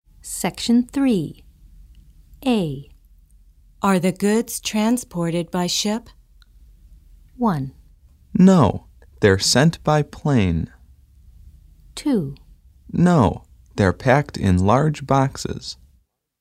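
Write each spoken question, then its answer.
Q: Are the goods transported by ship?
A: 1: No, they're sent by plane.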